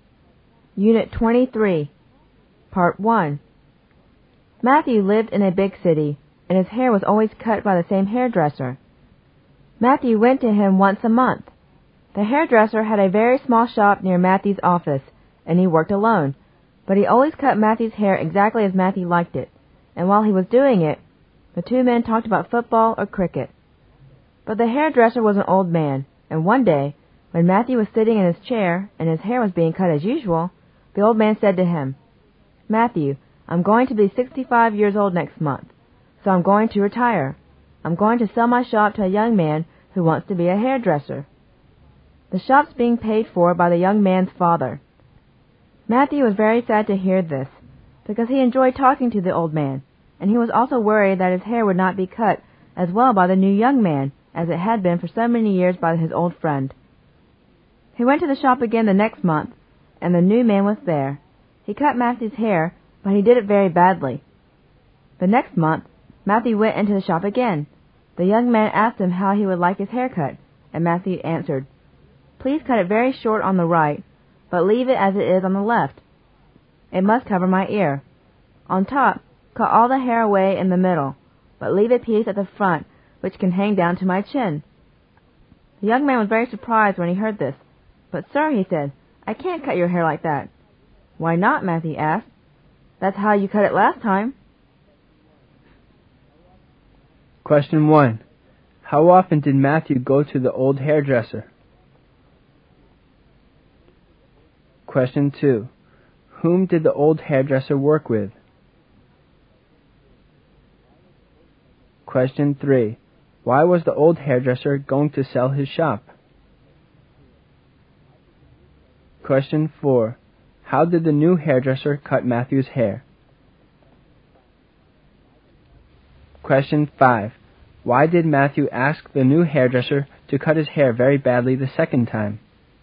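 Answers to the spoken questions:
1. Once a month
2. Nobody; he worked alone
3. He was turning 65 and going to retire
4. Very badly
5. To show him how badly he had cut it the last time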